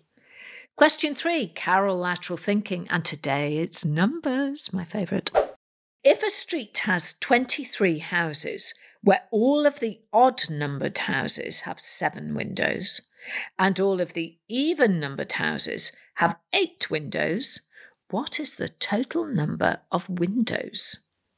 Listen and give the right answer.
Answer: Well, the answer is 172.